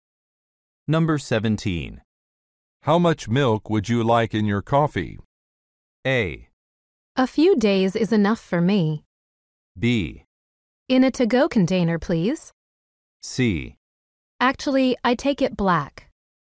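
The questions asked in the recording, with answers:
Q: How much milk would you like in your coffee?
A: C: Actually, I take it black.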